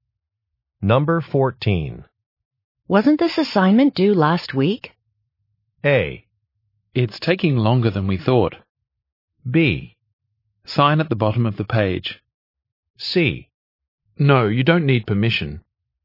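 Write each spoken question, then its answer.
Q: Wasn't this assignment due last week?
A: A: It's taking longer than we thought.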